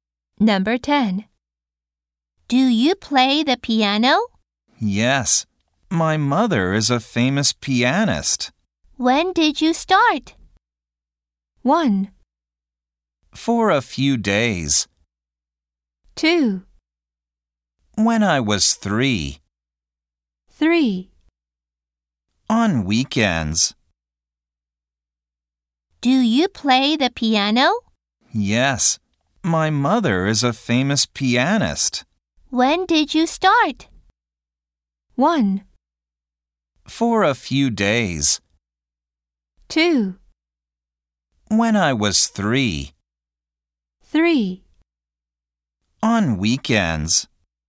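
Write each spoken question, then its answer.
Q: When did you start?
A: 2: When I was 3.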